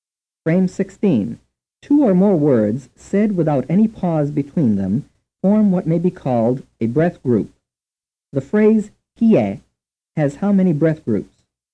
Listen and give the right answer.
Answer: The answer is one.